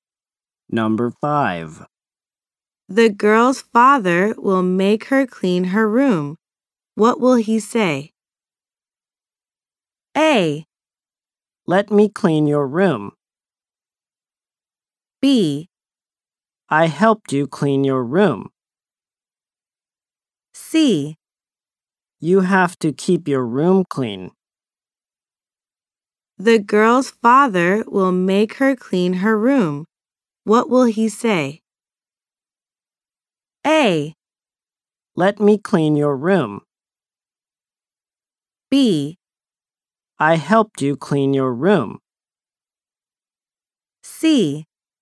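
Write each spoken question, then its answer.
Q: What will he say?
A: C: You have to keep your room clean.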